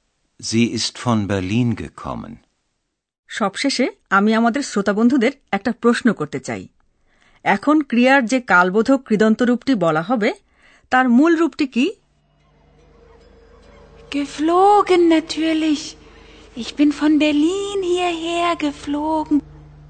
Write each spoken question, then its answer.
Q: এখন ক্রিয়ার যে কালবোধক কৃদন্ত রূপটি বলা হবে তার মূল রূপটি কি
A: ক্রিয়ার মূল রূপটি হলো ওরা ফ্লেগেন